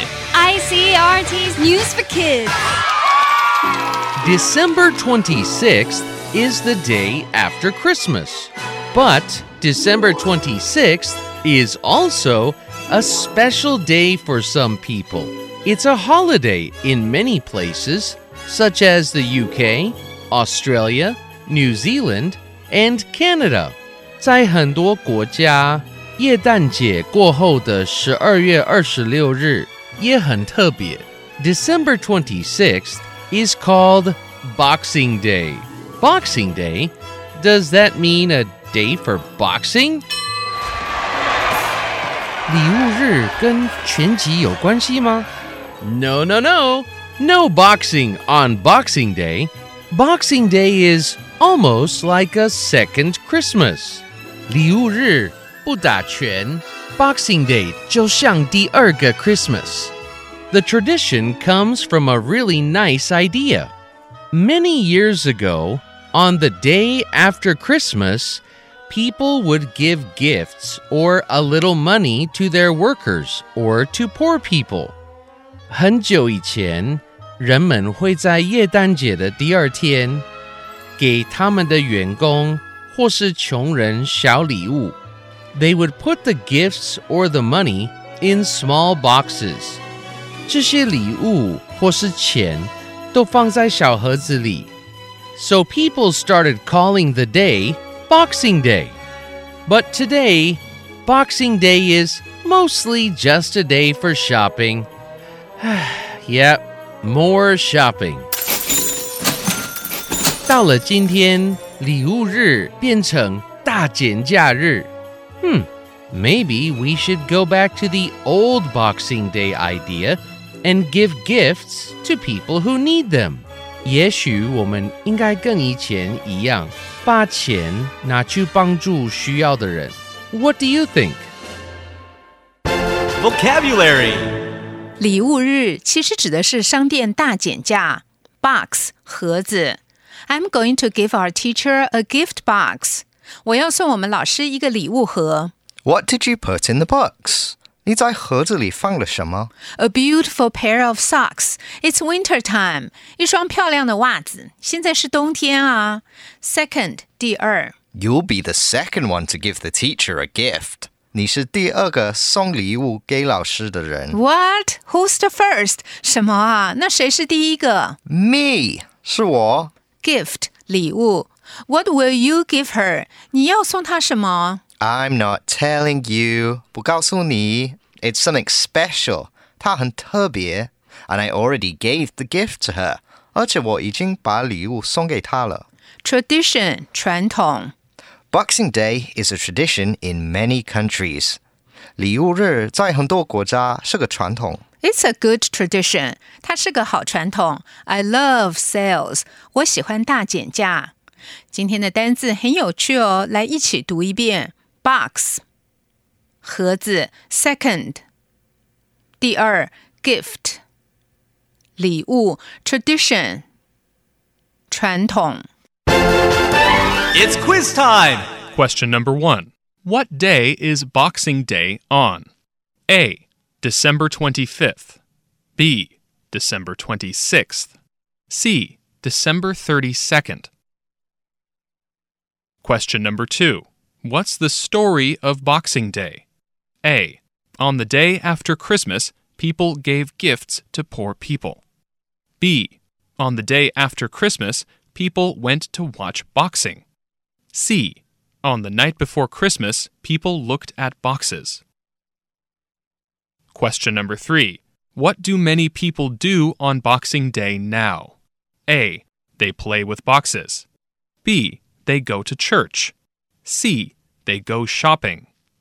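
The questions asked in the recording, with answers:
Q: What day is Boxing Day on?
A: B: December 26th.

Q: What's the story of Boxing Day?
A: A: On the day after Christmas, people gave gifts to poor people.

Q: What do many people do on Boxing Day now?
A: C: They go shopping.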